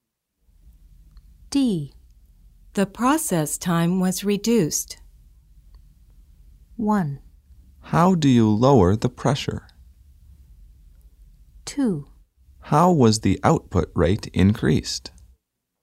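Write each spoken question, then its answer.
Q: The process time was reduced.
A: 2: How was the output rate increased?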